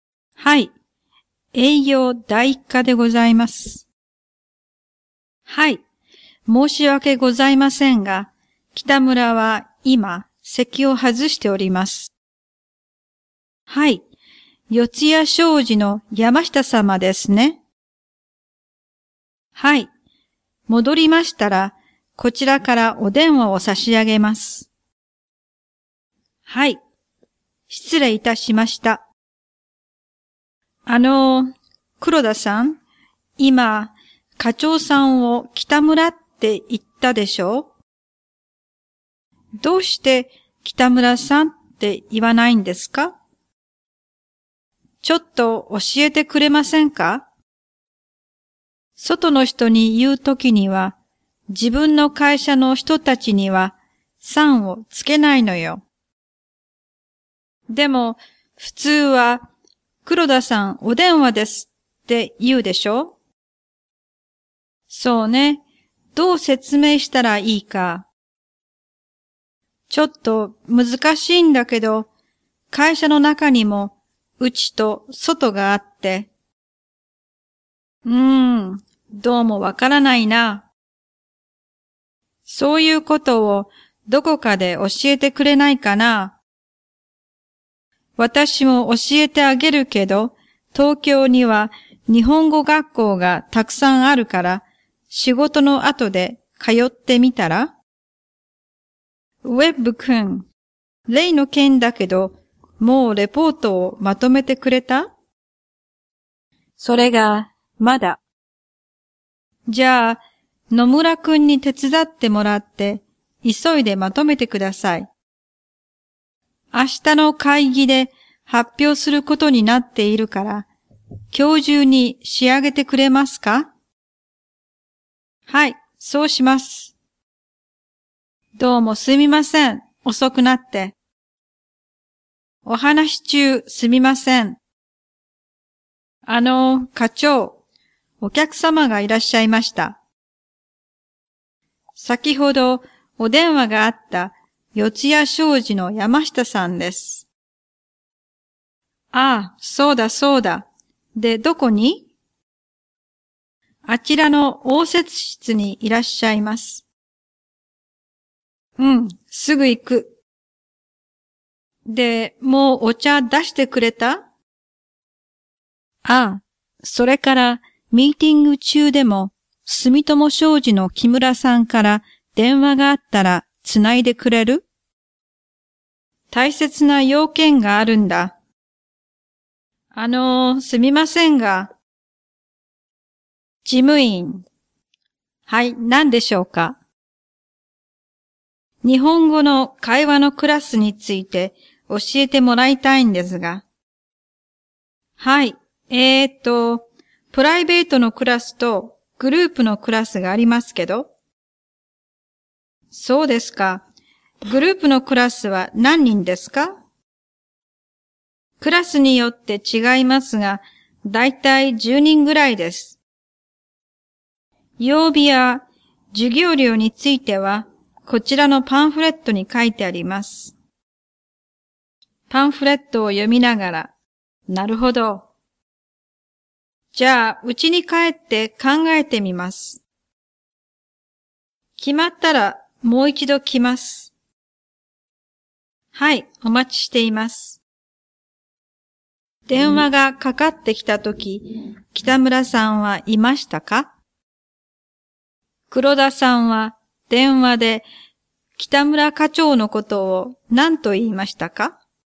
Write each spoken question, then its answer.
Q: 黒田さんは電話で、北村課長のことを何と言いましたか?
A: 北村と言いました。